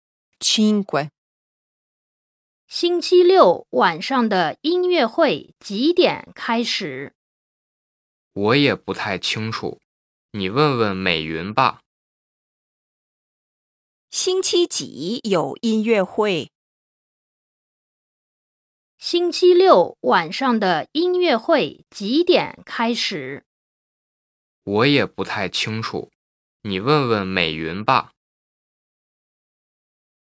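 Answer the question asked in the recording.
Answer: 星期六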